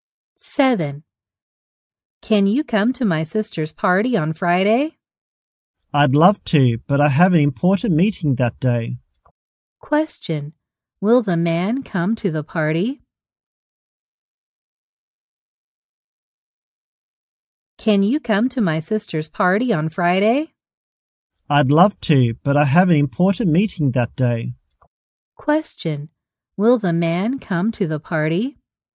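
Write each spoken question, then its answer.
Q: Will the man come to the party?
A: No, he has an important meeting.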